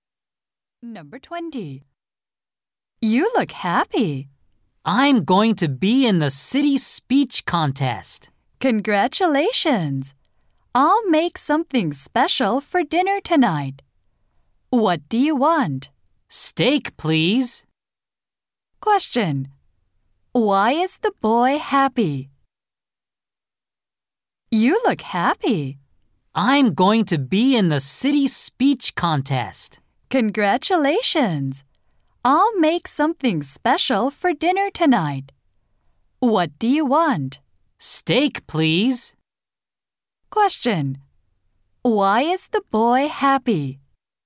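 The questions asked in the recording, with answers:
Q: Why is the boy happy?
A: He will be in the city speech contest.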